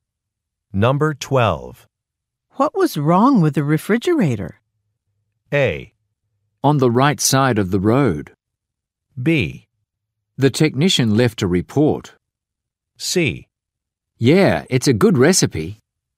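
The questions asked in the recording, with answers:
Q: What was wrong with the refrigerator?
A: B: The technician left a report.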